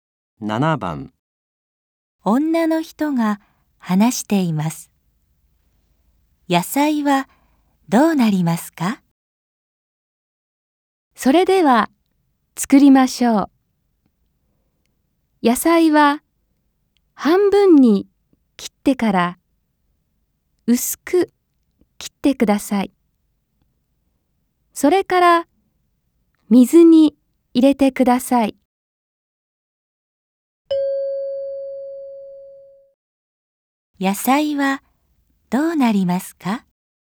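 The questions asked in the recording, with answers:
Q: 野菜はどうなりますか?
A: 半分に切ってから薄く切り、水に入れる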